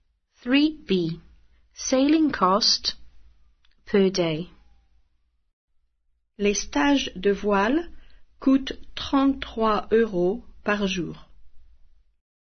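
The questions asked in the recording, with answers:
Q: Sailing cost per day.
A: 33 euros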